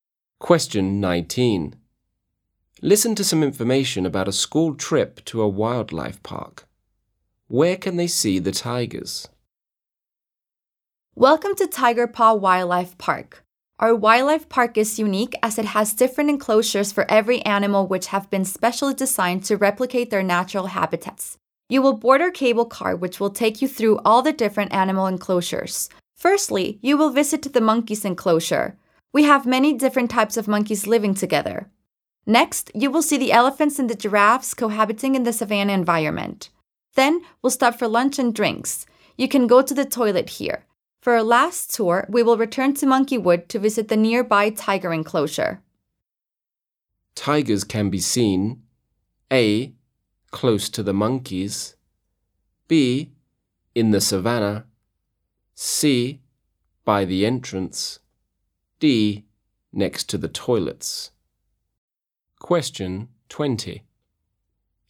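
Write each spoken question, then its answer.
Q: Where can they see the tigers?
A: A: Close to the monkeys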